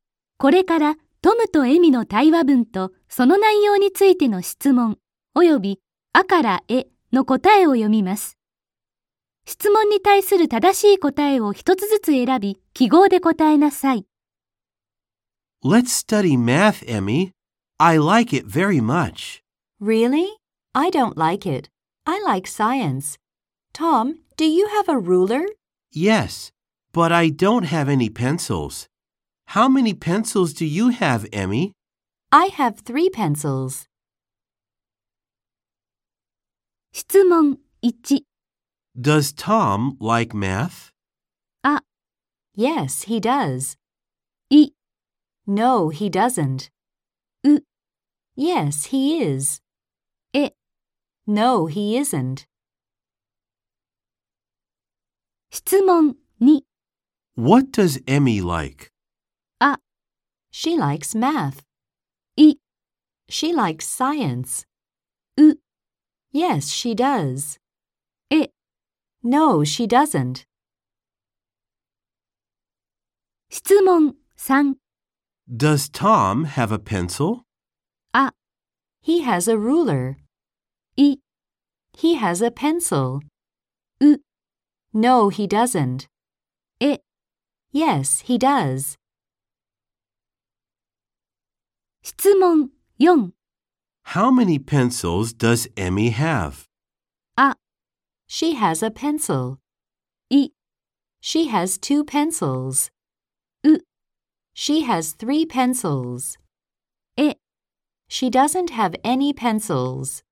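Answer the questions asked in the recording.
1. ア: Yes, he does.
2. イ: She likes science.
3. ウ: No, he doesn't.
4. ウ: She has 3 pencils.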